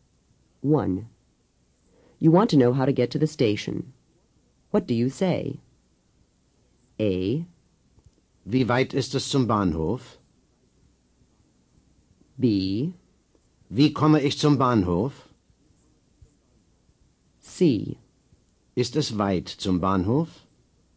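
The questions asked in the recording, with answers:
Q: You want to know how to get to the station. What do you say?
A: B: Wie komme ich zum Bahnhof?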